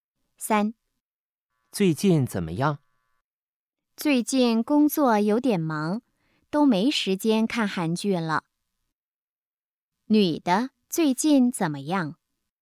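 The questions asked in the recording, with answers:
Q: 女的最近怎么样?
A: 工作有点忙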